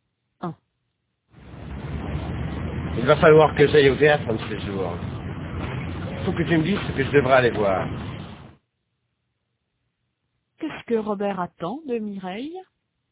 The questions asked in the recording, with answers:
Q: Qu'est-ce que Robert attend de Mireille?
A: Qu'elle lui dise ce qu'il devrait aller voir.